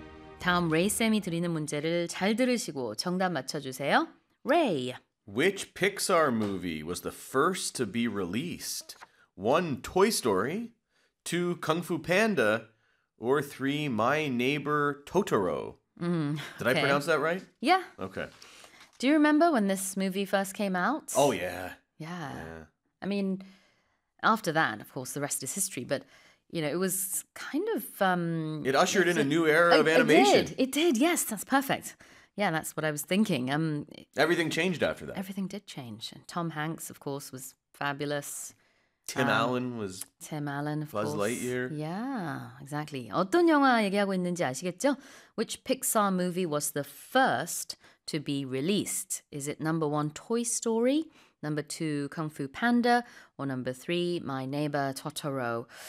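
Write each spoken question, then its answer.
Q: Which Pixar movie was the first to be released?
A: 1: Toy Story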